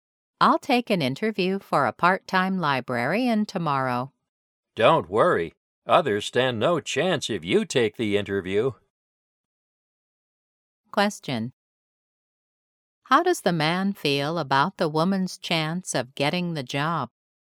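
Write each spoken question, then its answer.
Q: How does the man feel about the woman's chance of getting the job?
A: He is confident she will get it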